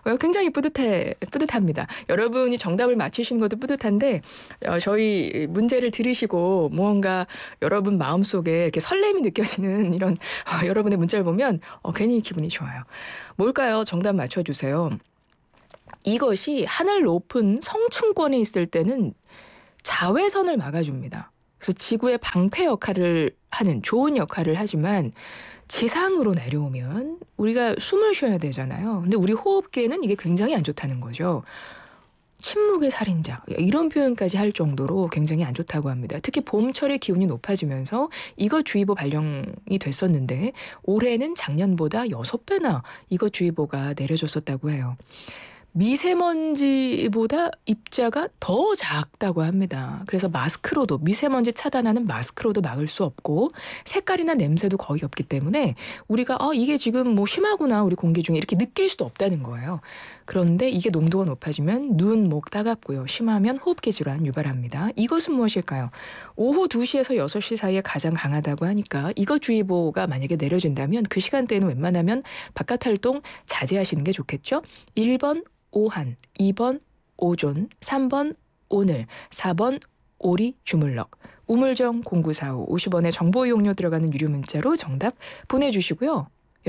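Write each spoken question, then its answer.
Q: 이것은 무엇일까요?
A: 2번: 오존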